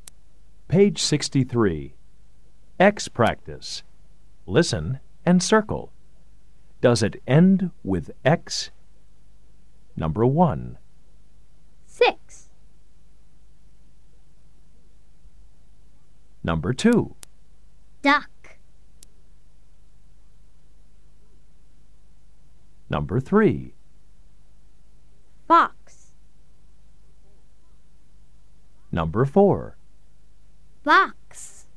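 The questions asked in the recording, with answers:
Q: Does it end with X?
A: Yes (six)

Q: Does it end with X?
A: No (duck)

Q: Does it end with X?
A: Yes (fox)

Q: Does it end with X?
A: Yes (box)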